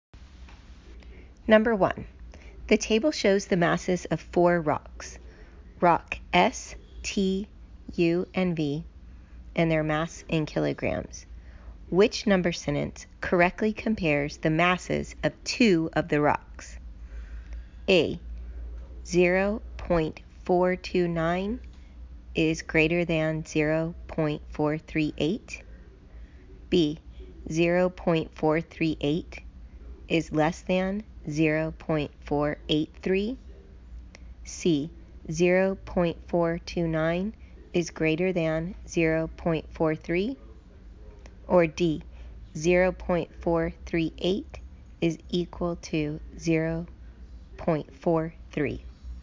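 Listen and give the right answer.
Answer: B: 0.438 is less than 0.483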